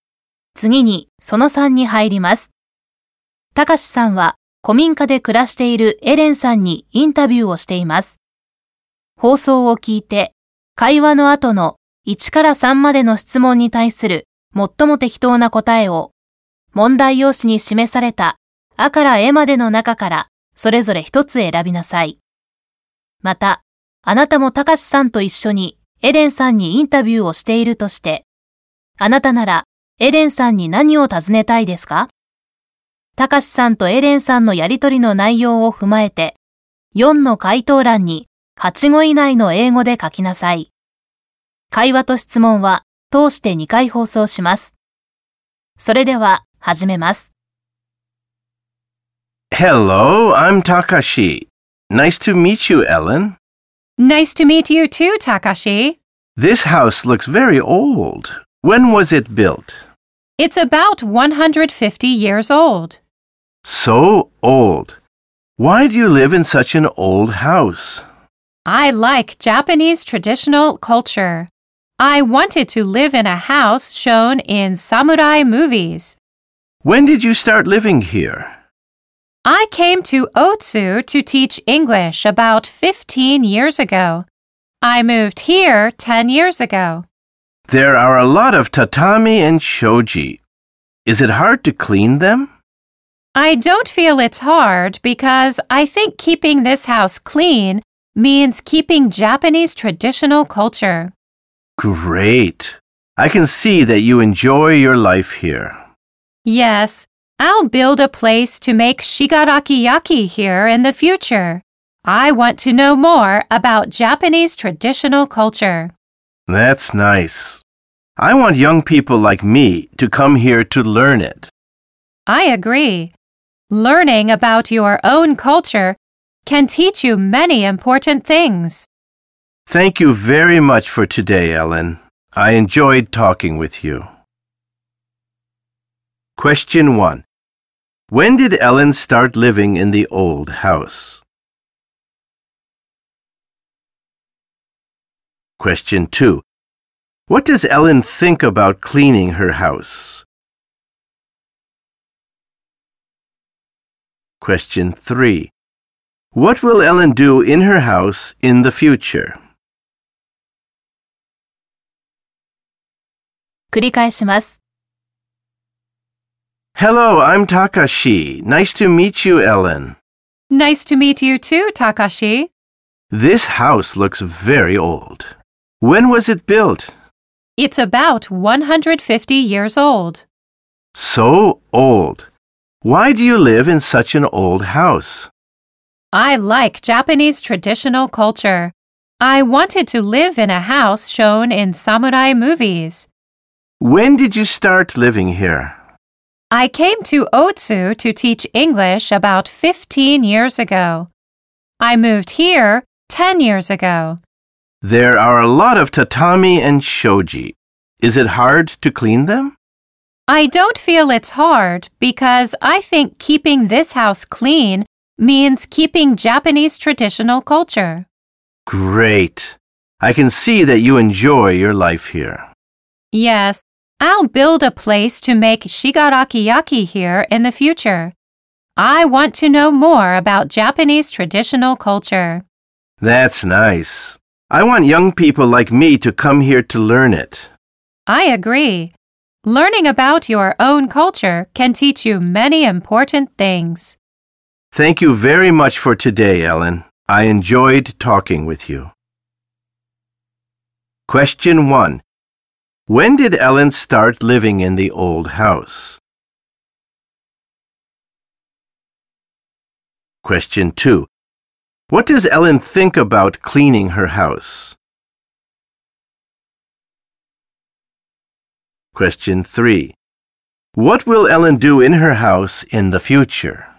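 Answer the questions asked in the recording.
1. 10 years ago
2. It isn't hard, because keeping the house clean means keeping Japanese traditional culture
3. Build a place to make Shigaraki ware (shigarakiyaki)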